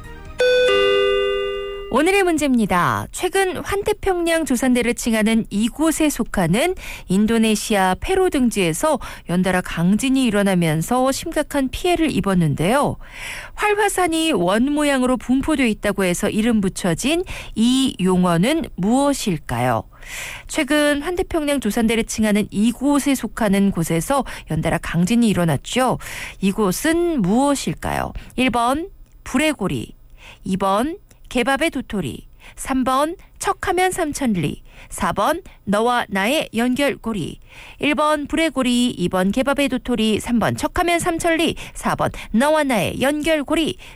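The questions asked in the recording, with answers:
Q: 이곳은 무엇일까요?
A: 1: 불의 고리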